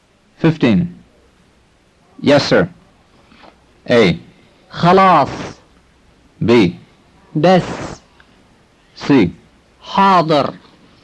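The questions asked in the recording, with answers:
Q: Yes, sir.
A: C: حاضر.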